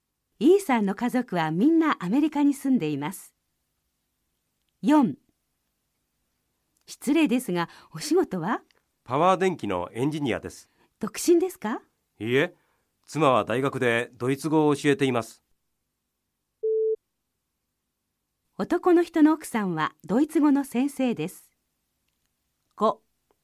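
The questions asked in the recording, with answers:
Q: 男の人の奥さんはドイツ語の先生です。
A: ○(正しい)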